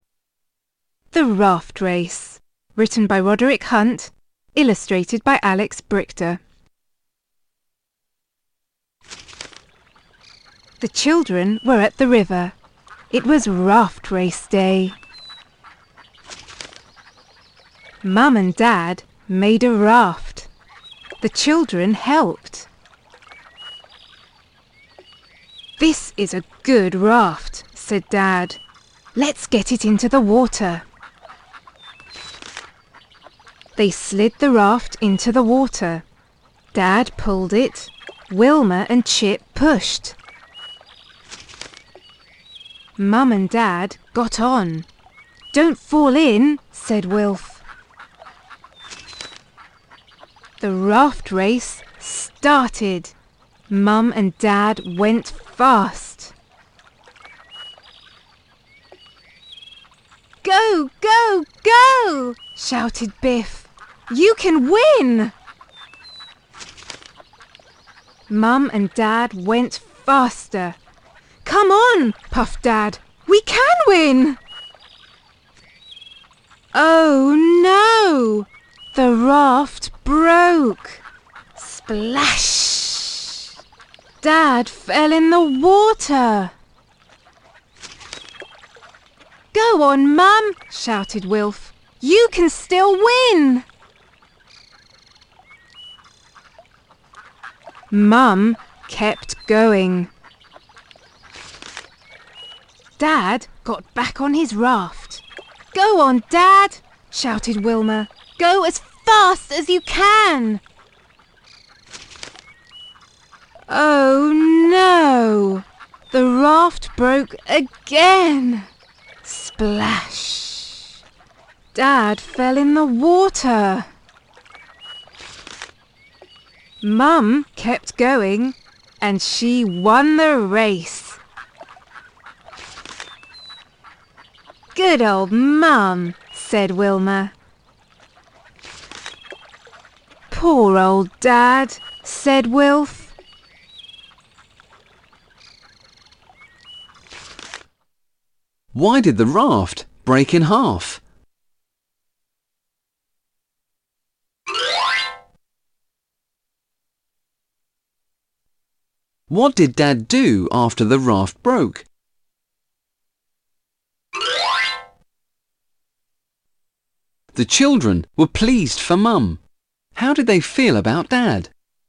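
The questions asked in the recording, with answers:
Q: What did Dad do after the raft broke?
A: He fell in the water, then got back on the raft

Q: How did they feel about Dad?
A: Sorry for him ("Poor old Dad")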